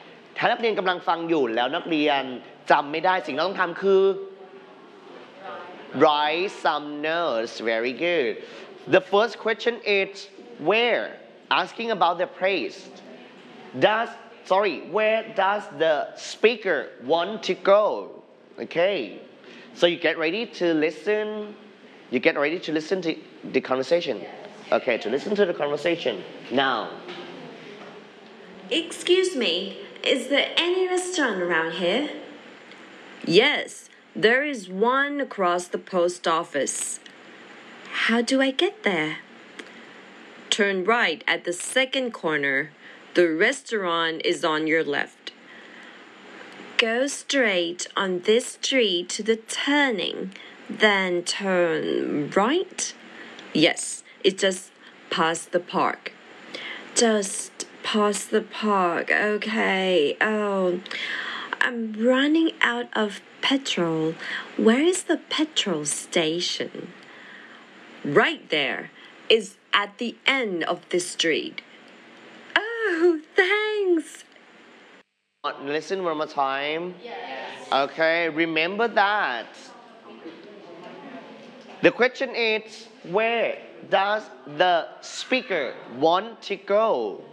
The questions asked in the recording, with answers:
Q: Where does the speaker want to go?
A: First, she wants to go to the restaurant first, and the and the petrol station.